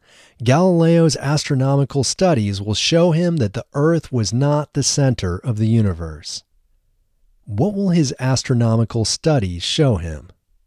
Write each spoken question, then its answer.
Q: What will his astronomical studies show him?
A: His astronomical studies will show him that the Earth was not the center of the universe.